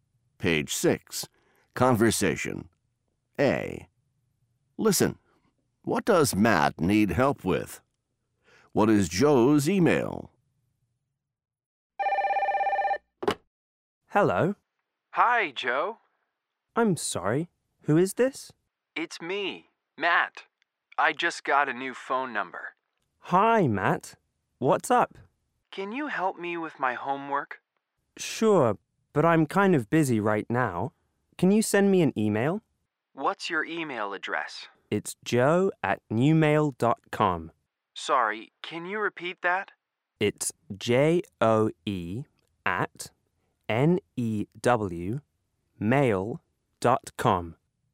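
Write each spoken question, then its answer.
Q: What does Matt need help with?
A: His homework

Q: What is Joe's email?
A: joe@newmail.com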